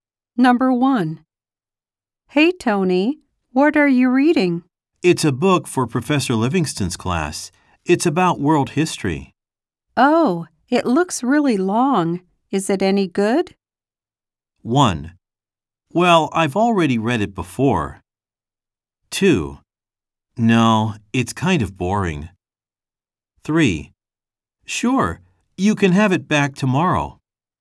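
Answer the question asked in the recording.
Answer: 2: No, it's kind of boring.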